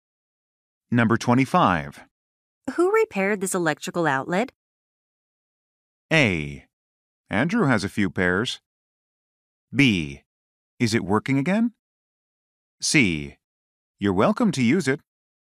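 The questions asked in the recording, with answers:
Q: Who repaired this electrical outlet?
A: B: Is it working again?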